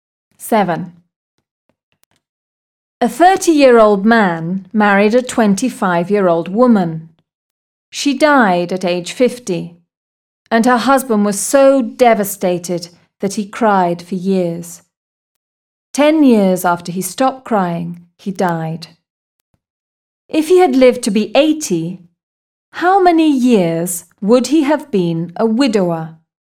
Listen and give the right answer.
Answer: He would have been a widower for 25 years.